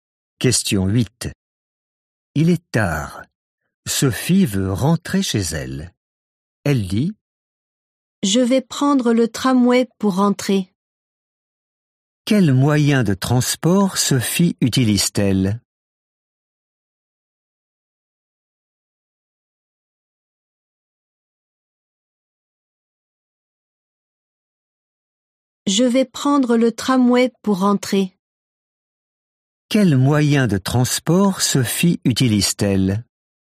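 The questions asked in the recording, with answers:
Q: Quel moyen de transport Sophie utilise-t-elle?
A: Le tramway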